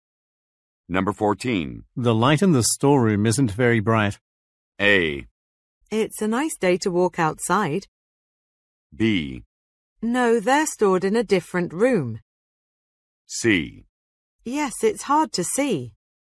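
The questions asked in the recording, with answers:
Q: The light in the storeroom isn't very bright.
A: C: Yes, it's hard to see.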